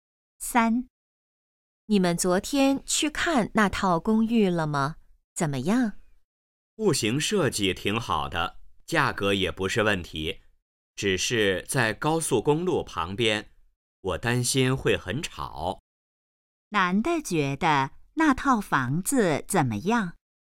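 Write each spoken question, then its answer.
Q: 男的觉得那套房子怎么样?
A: 在高速公路旁边,可能很吵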